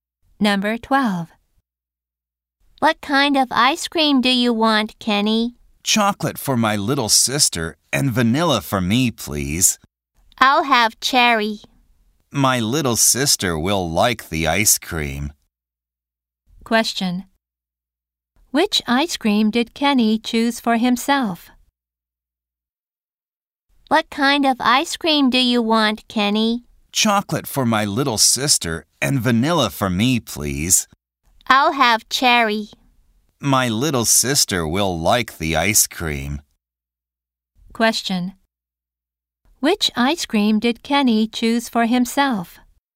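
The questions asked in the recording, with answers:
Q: Which ice cream did Kenny choose for himself?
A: Vanilla.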